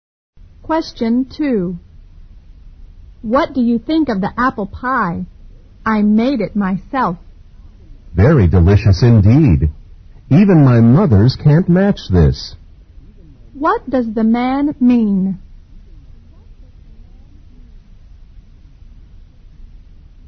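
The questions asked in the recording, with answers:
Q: What does the man mean?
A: The pie is even better than his mother's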